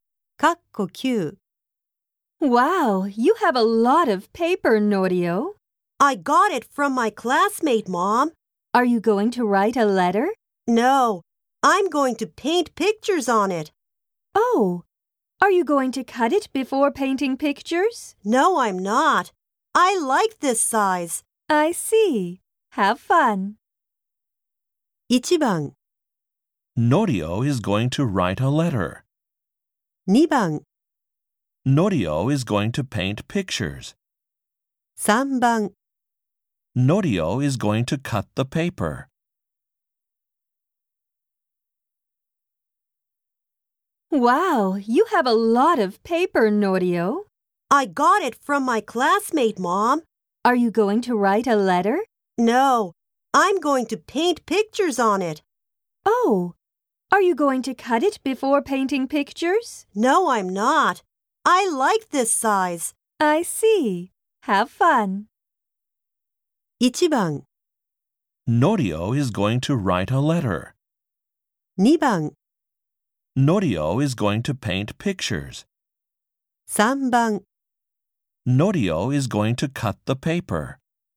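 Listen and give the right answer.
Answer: 2: Norio is going to paint pictures.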